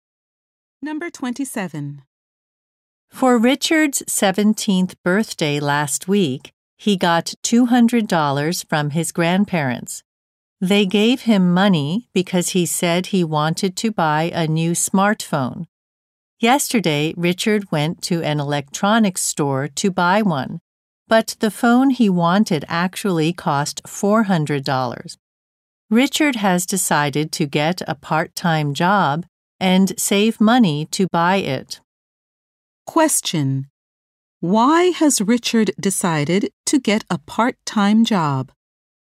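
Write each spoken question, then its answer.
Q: Why has Richard decided to get a part-time job?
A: The phone he wants costs more than he has.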